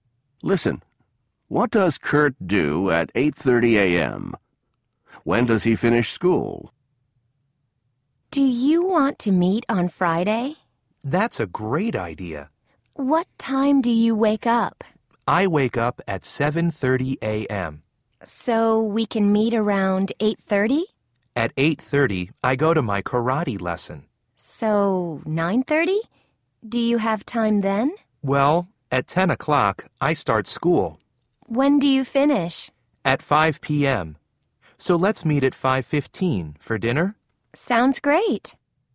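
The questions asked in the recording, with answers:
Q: What does Kurt do at 8:30 a.m.?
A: He goes to his karate lesson.

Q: When does he finish school?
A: At 5 p.m.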